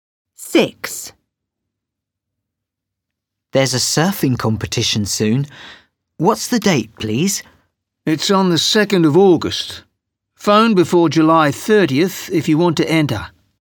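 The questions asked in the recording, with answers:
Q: What's the date, please?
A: The 2nd of August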